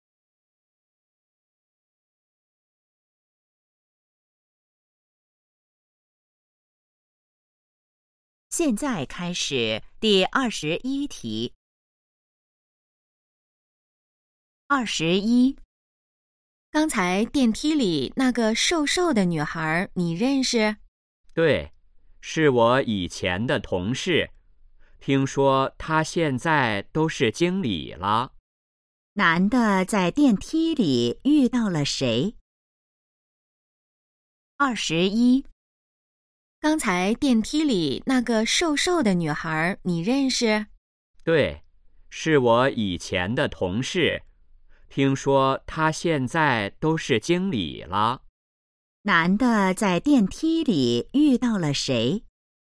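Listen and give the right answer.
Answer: 以前的同事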